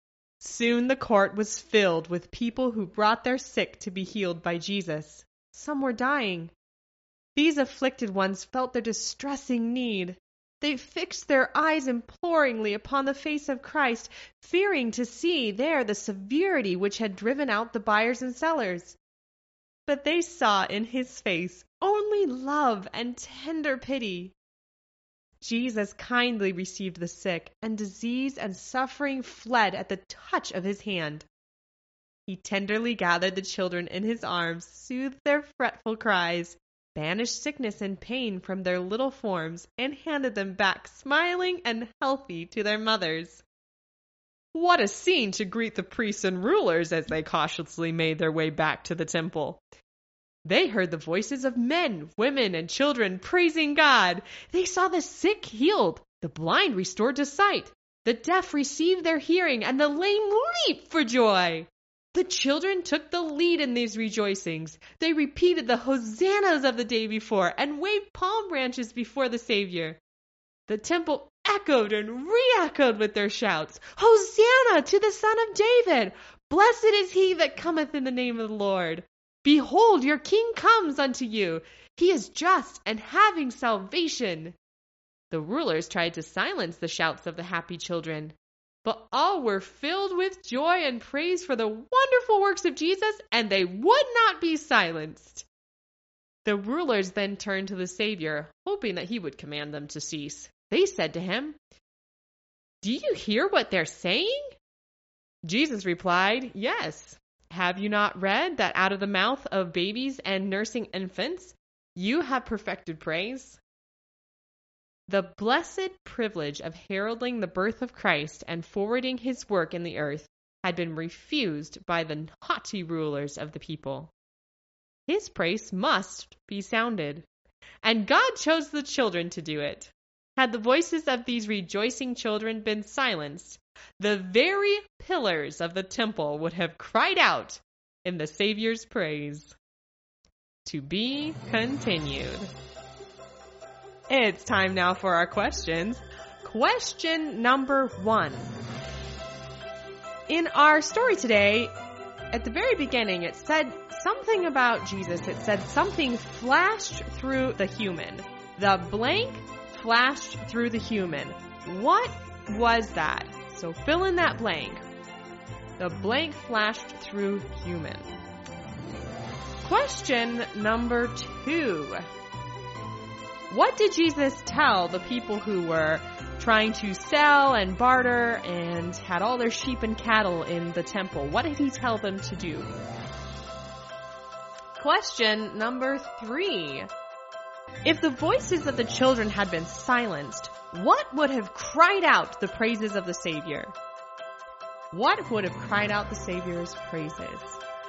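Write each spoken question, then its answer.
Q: If the voices of the children had been silenced, what would have cried out the praises of the Savior?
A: the very pillars of the temple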